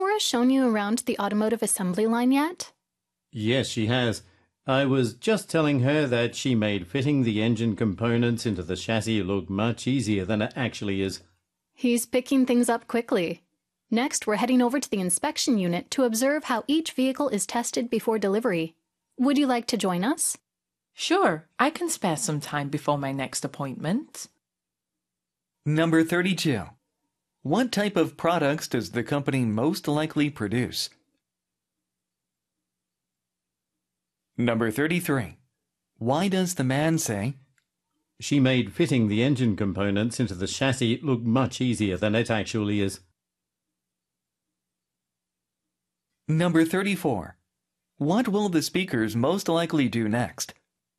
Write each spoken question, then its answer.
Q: What type of products does the company most likely produce?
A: 32번 정답 D, automobiles에서 D가 정답이 되죠.